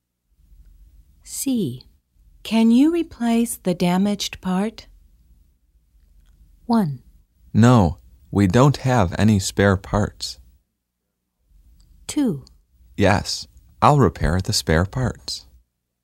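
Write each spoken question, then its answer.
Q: Can you replace the damaged part?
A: 1: No, we don't have any spare parts.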